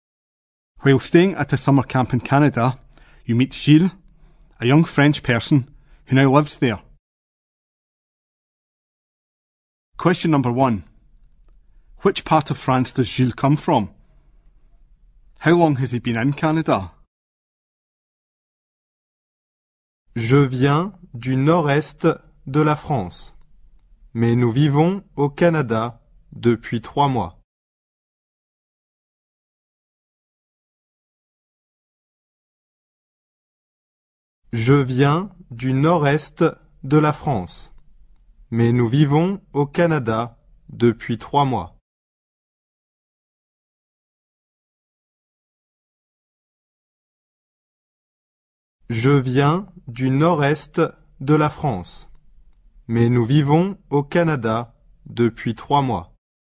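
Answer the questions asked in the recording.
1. The north-east
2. 3 months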